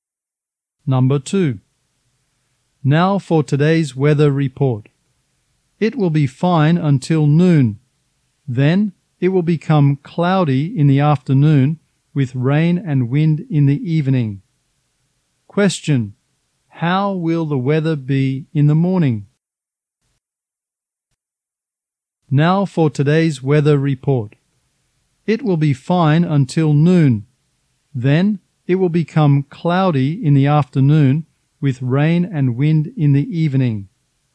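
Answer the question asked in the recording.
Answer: Fine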